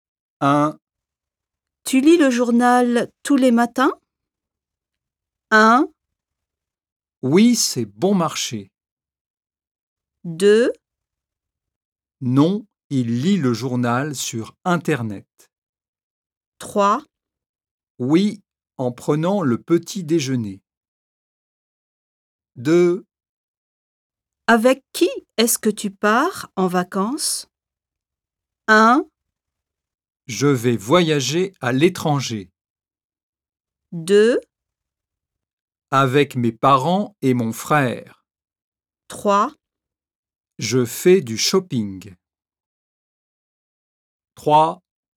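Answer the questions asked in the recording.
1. 3: Oui, en prenant le petit déjeuner.
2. 2: Avec mes parents et mon frère.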